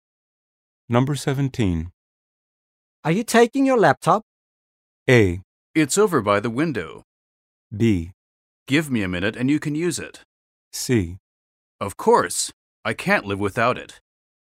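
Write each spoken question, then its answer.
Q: Are you taking your laptop?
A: C: Of course. I can't live without it.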